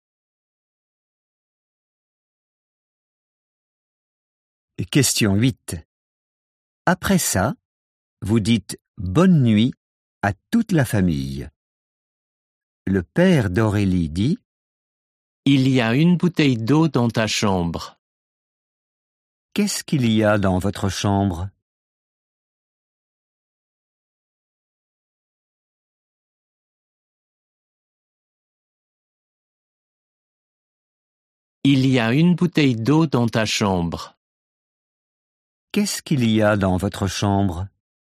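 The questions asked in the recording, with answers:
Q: Qu'est-ce qu'il y a dans votre chambre?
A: Une bouteille d'eau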